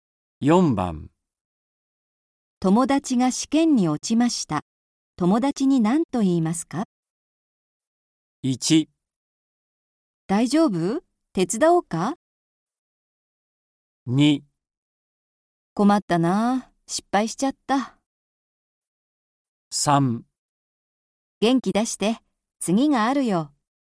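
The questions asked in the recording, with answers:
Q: 友達が試験に落ちました。友達に何と言いますか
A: 3: 元気出して。次があるよ。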